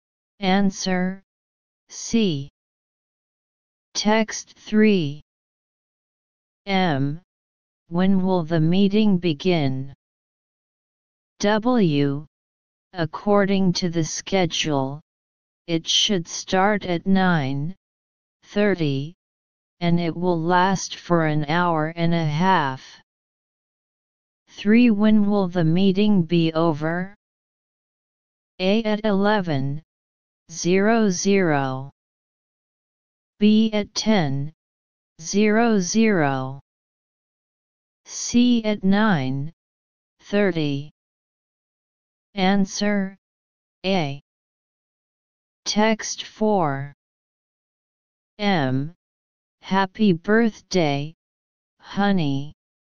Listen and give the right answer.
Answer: Answer A.